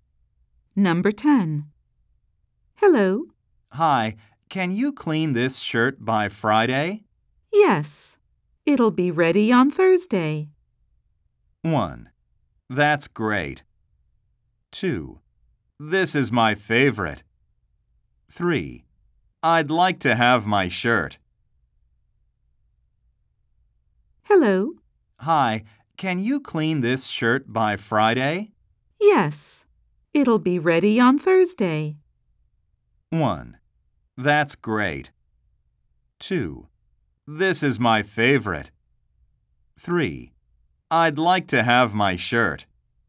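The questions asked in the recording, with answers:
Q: Yes. It'll be ready on Thursday.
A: 1: That's great.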